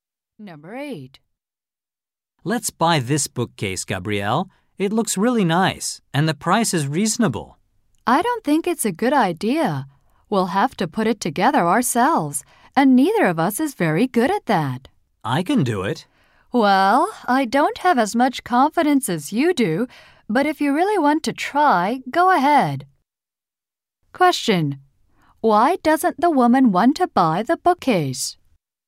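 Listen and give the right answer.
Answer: They would have to assemble it themselves and aren't good at that.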